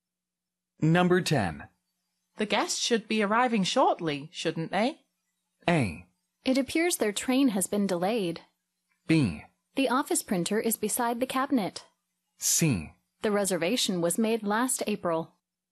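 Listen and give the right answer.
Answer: A: It appears their train has been delayed.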